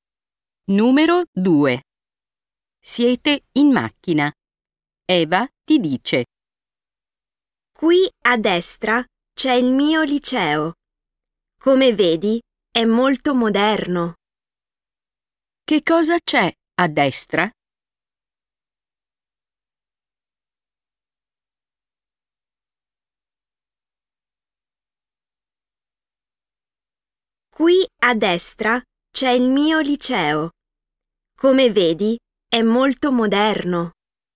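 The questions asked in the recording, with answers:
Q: Che cosa c'è a destra?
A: il liceo di Eva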